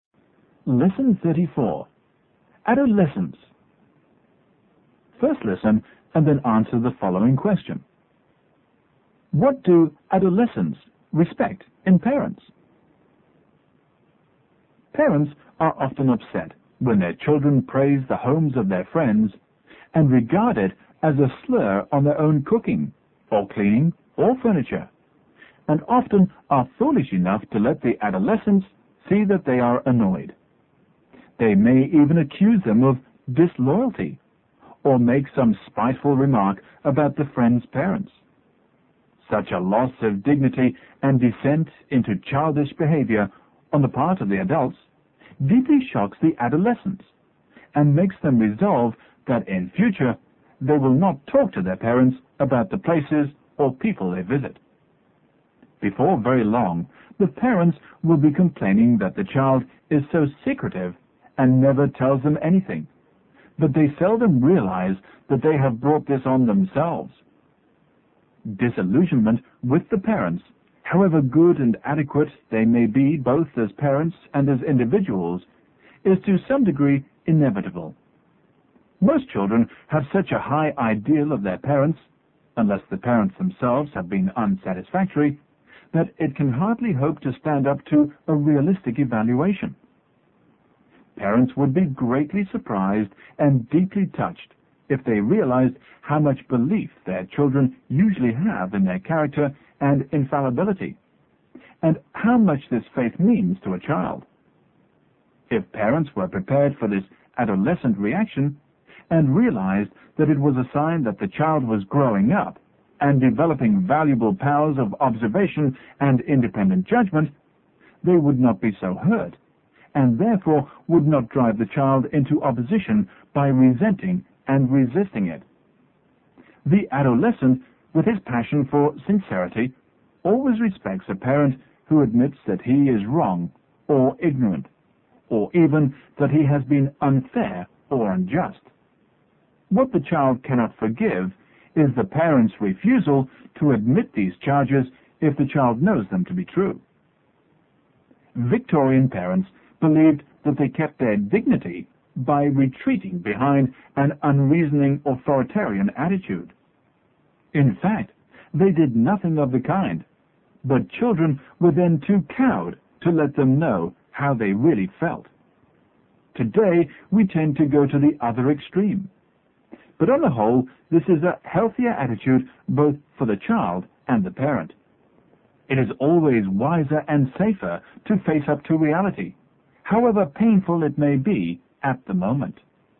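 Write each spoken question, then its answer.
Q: What do adolescents respect in parents?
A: A parent who admits that he is wrong or ignorant, or even unfair or unjust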